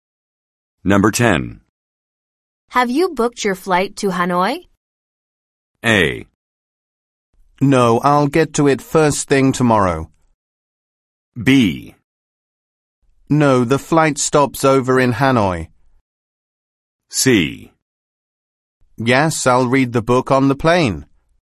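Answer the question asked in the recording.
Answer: A: No, I'll get to it first thing tomorrow.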